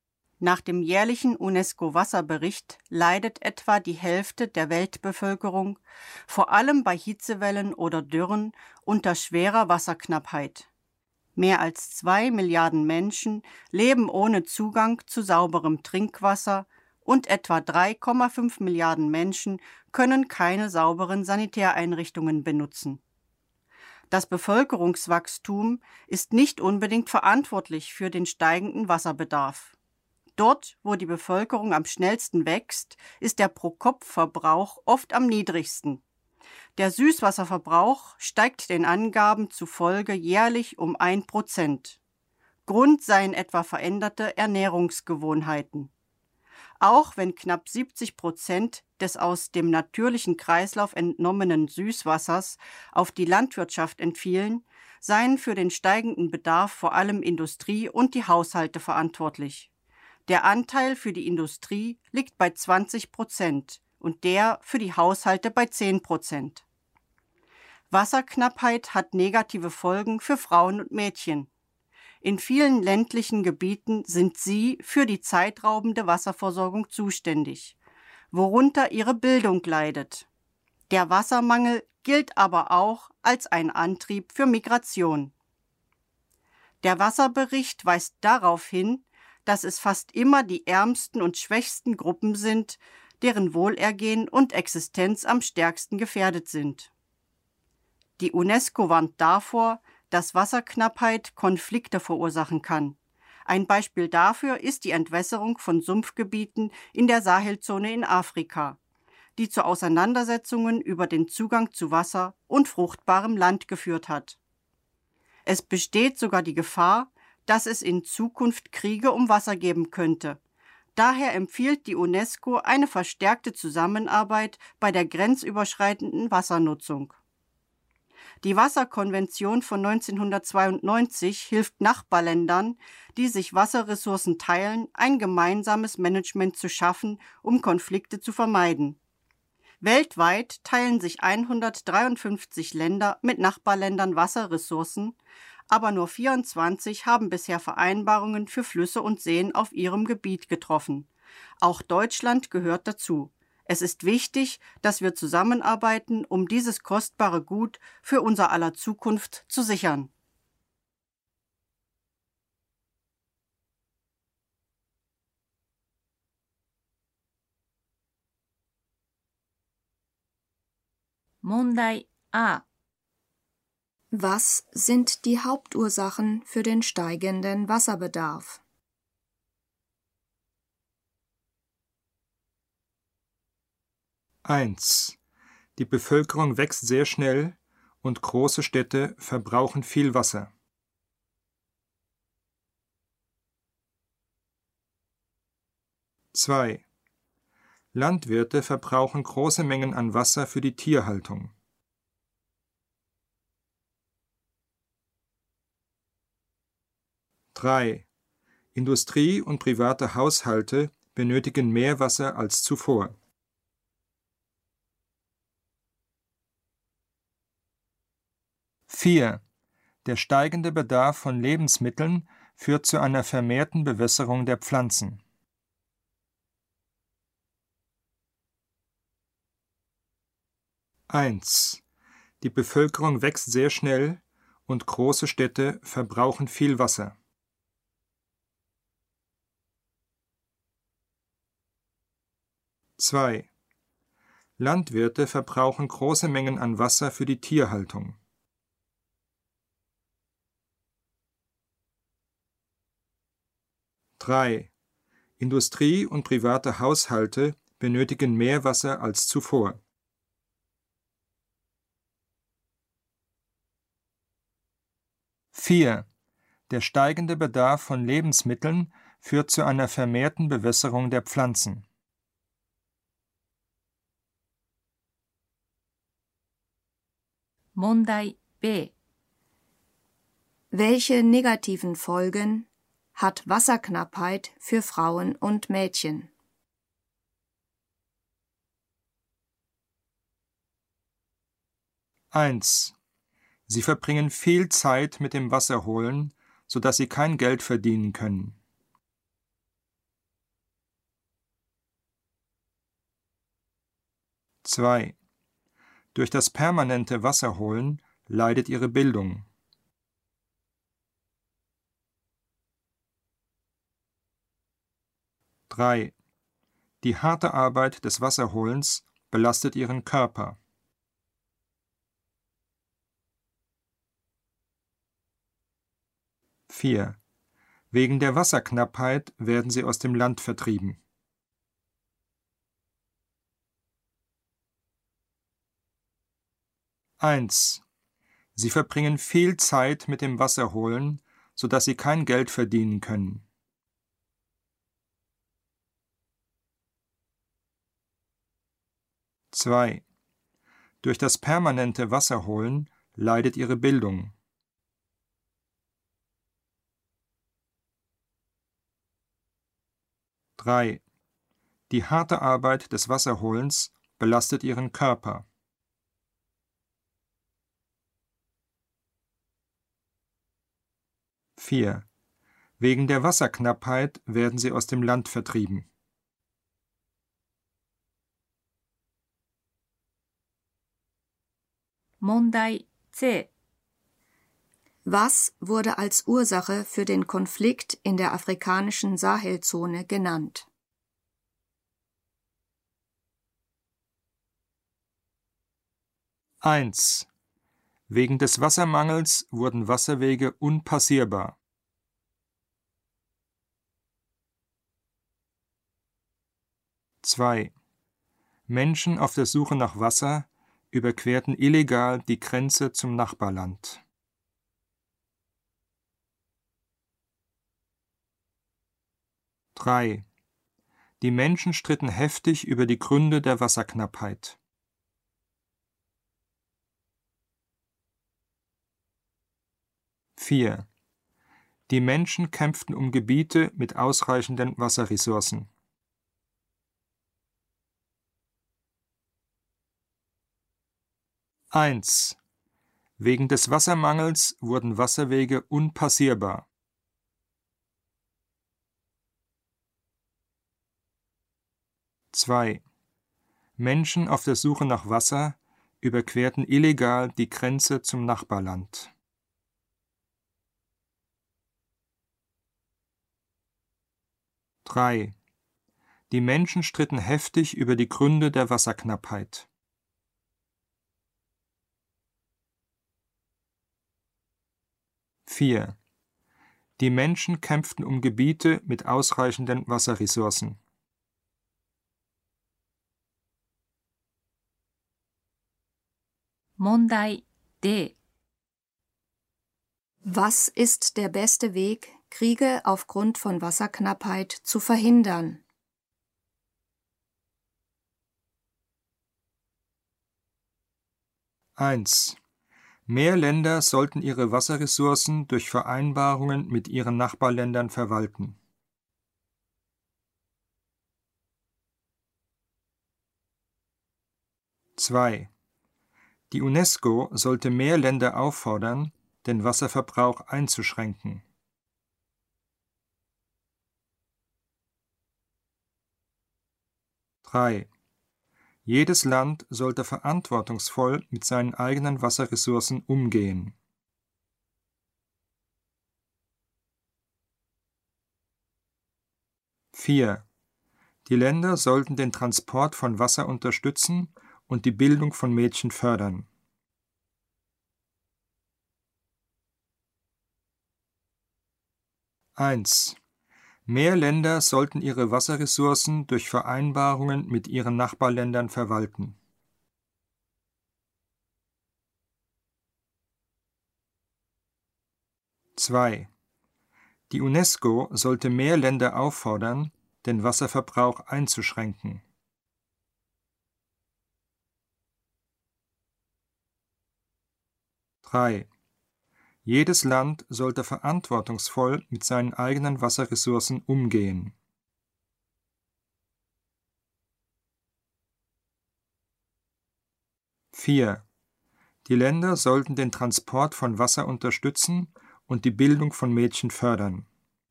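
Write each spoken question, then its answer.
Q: Was sind die Hauptursachen für den steigenden Wasserbedarf?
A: 3: Industrie und private Haushalte benötigen mehr Wasser als zuvor.

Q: Welche negativen Folgen hat Wasserknappheit für Frauen und Mädchen?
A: 2: Durch das permanente Wasserholen leidet ihre Bildung.

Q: Was wurde als Ursache für den Konflikt in der afrikanischen Sahelzone genannt?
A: 4: Die Menschen kämpften um Gebiete mit ausreichenden Wasserressourcen.

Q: Was ist der beste Weg, Kriege aufgrund von Wasserknappheit zu verhindern?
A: 1: Mehr Länder sollten ihre Wasserressourcen durch Vereinbarungen mit ihren Nachbarländern verwalten.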